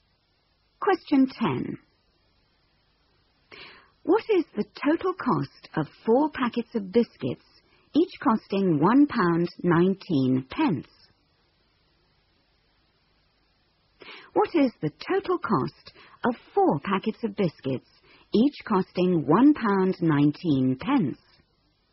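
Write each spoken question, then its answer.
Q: What is the total cost of 4 packets of biscuits, each costing £1.19?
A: £4.76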